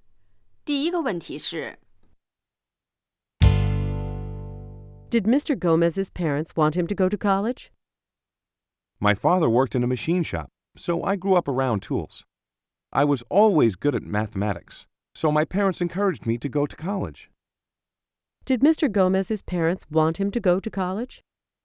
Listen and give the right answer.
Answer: Yes, they did. They encouraged him to go to college.